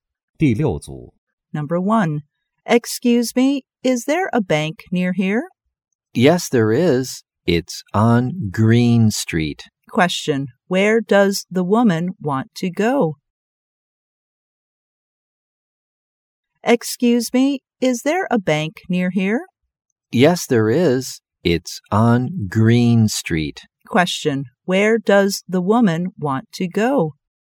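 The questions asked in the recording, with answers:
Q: Where does the woman want to go?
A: A bank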